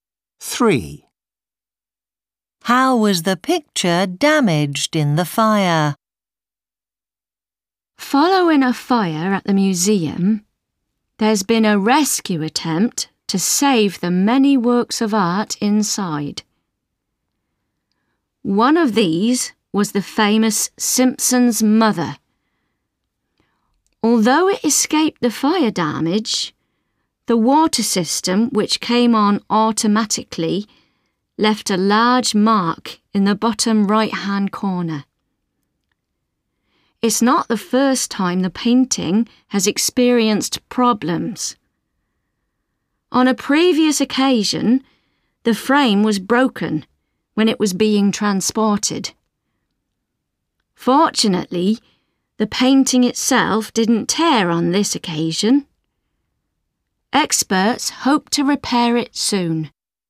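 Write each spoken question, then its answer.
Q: How was the picture damaged in the fire?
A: The water system left a large mark in the bottom right-hand corner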